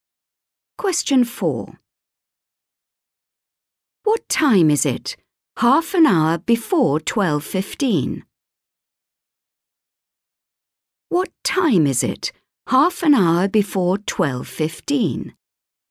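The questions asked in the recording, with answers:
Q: What time is it? Half an hour before 12:15.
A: 11:45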